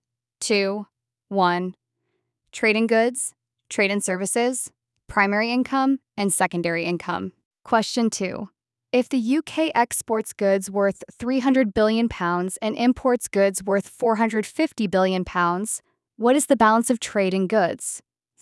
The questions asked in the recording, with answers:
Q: If the UK exports goods worth £300 billion and imports goods worth £450 billion, what is the balance of trade in goods?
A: A deficit of £150 billion.